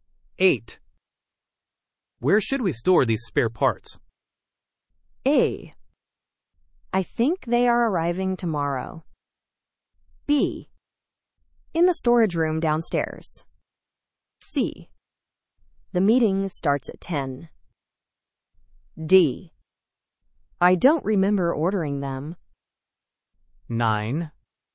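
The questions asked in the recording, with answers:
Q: Where should we store these spare parts?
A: B: In the storage room downstairs.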